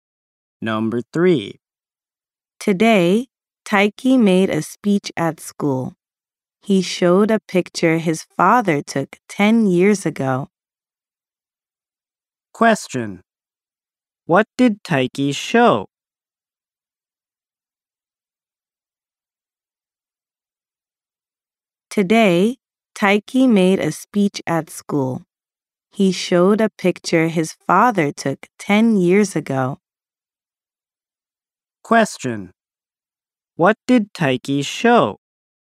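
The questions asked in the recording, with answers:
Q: What did Taiki show?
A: A picture his father took 10 years ago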